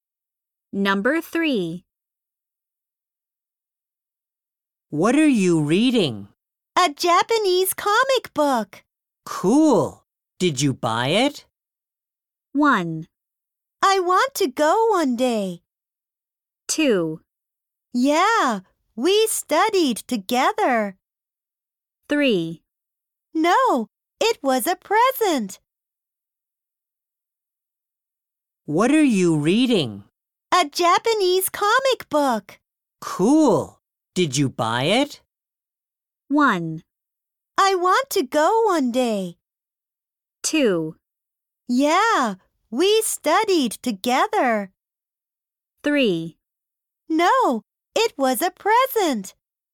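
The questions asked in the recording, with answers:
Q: Cool. Did you buy it?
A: 3: No, it was a present.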